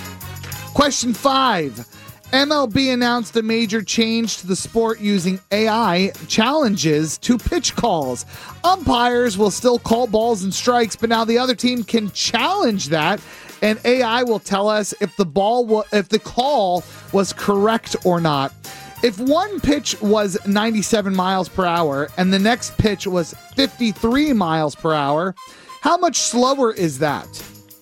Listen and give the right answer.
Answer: 44.